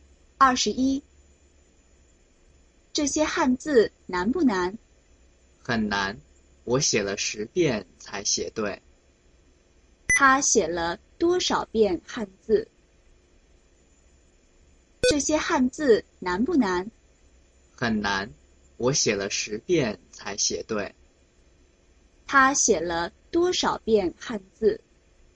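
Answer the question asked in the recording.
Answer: 十遍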